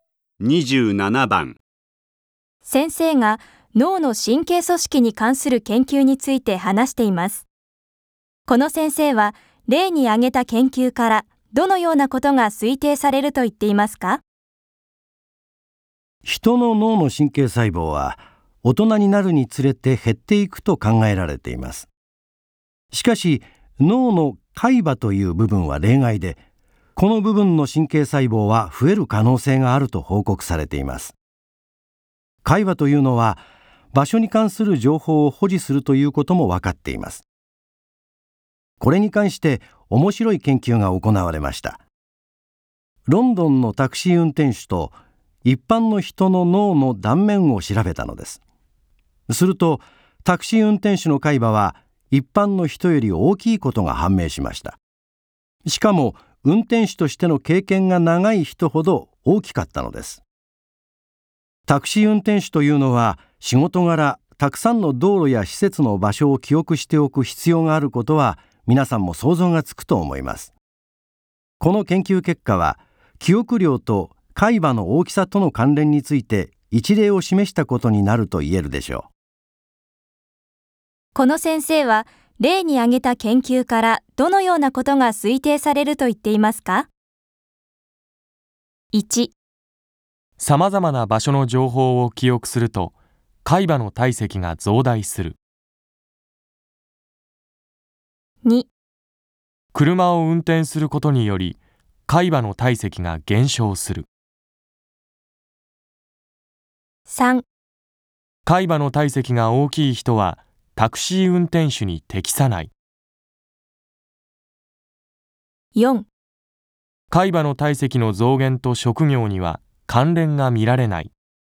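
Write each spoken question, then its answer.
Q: この先生は、例に挙げた研究からどのようなことが推定されると言っていますか?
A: 1: さまざまな場所の情報を記憶すると、海馬の体積が増大する。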